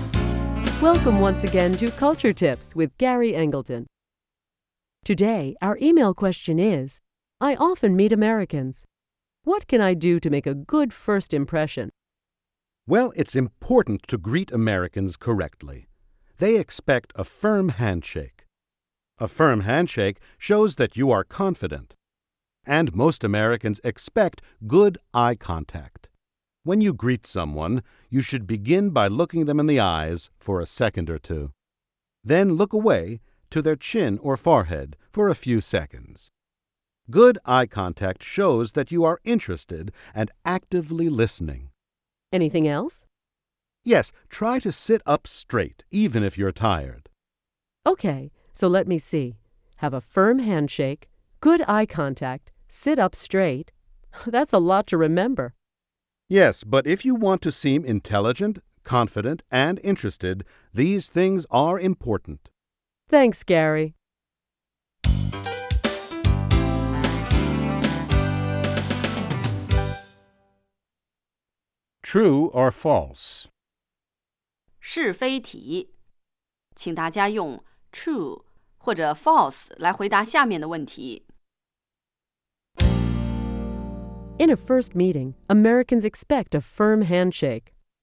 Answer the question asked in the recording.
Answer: True. A firm handshake shows that you are confident.